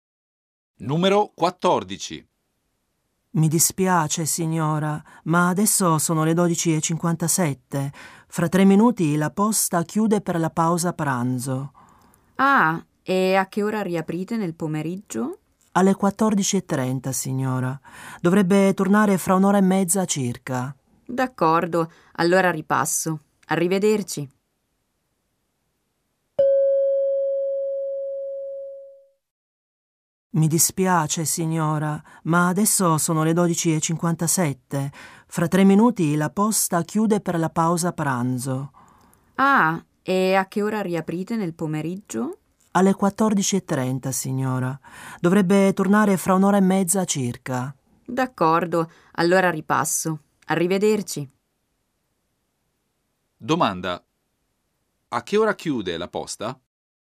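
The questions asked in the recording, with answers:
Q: Domanda. A che ora chiude la posta?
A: Alle 13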